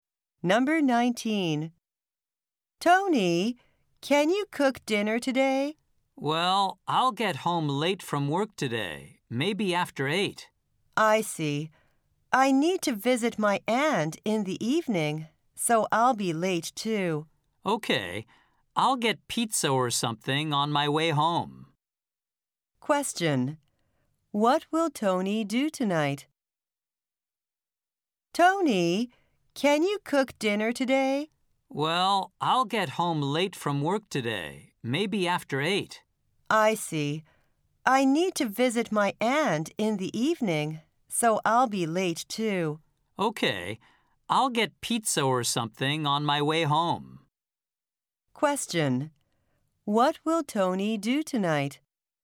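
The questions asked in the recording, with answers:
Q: What will Tony do tonight?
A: Get pizza or something on his way home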